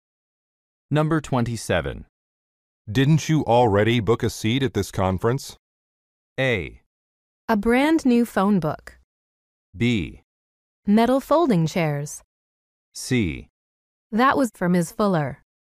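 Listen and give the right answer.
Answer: C: That was for Ms. Fuller.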